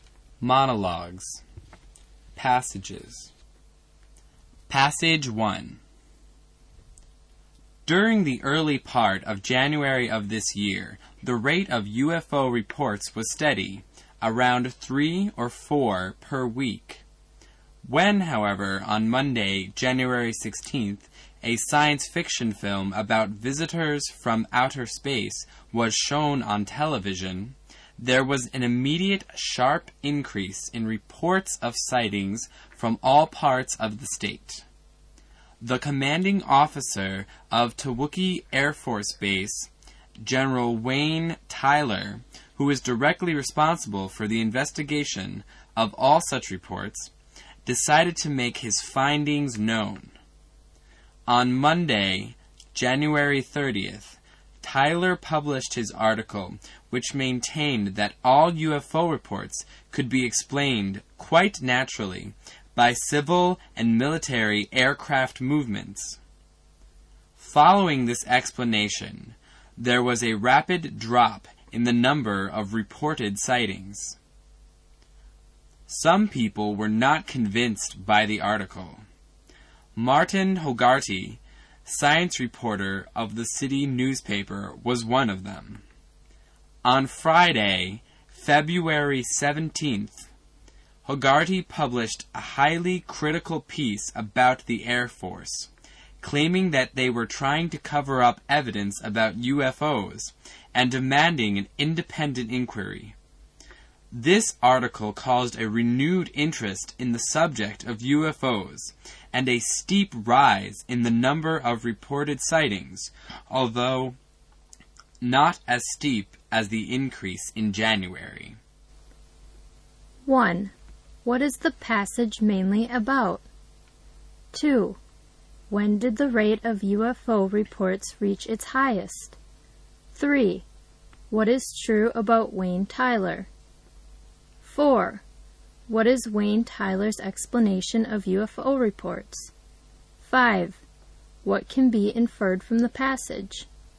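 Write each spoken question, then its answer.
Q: When did the rate of UFO reports reach its highest?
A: In January, after the science fiction film was shown on January 16th

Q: What is Wayne Tyler's explanation of UFO reports?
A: They can be explained by civil and military aircraft movements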